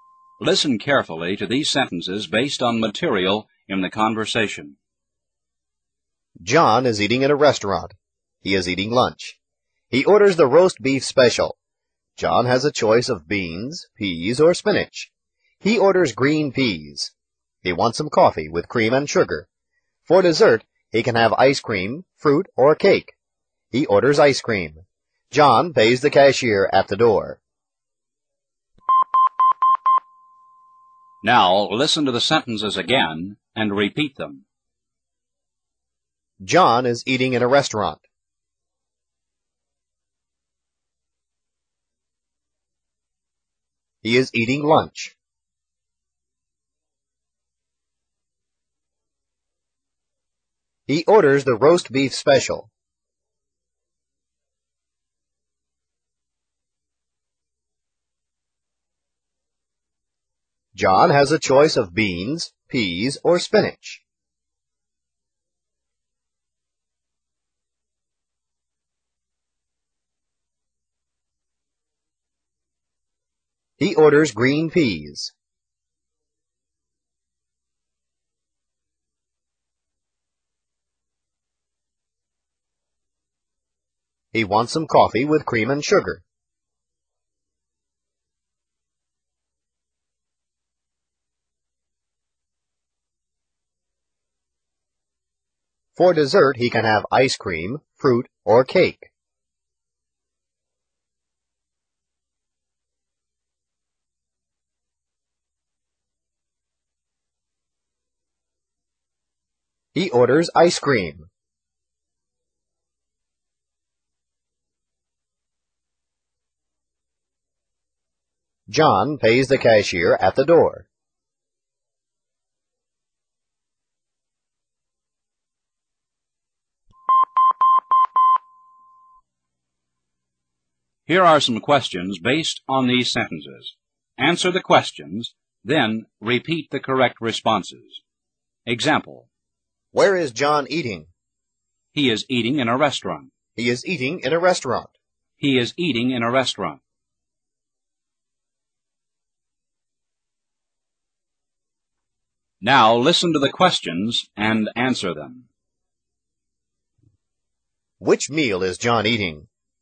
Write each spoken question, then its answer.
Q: Which meal is John eating?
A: John is eating lunch.